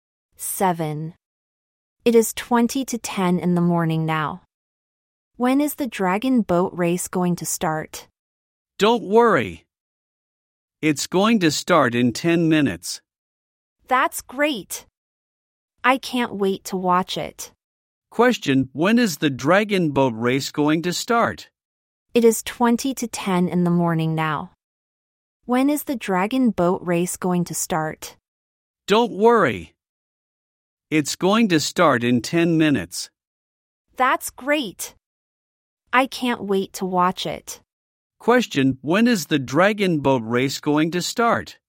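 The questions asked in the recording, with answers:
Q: Question, when is the dragon boat race going to start?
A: At ten to ten (9:50) in the morning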